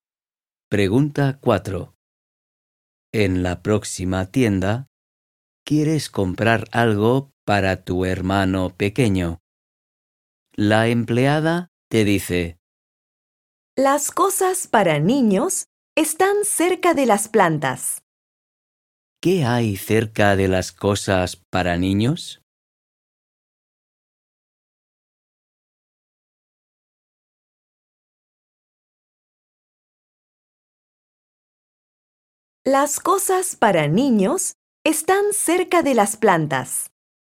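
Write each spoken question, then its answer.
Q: ¿Qué hay cerca de las cosas para niños?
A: las plantas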